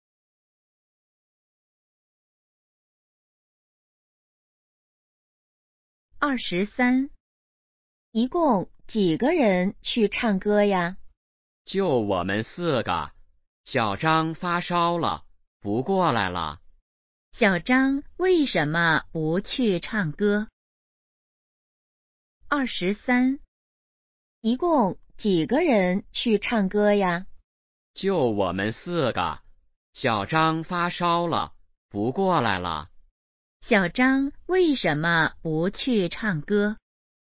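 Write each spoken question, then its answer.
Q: 小张为什么不去唱歌?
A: 发烧了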